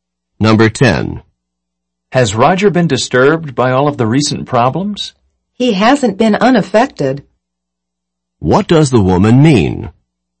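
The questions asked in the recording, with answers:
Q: What does the woman mean?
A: Roger has been affected by the problems.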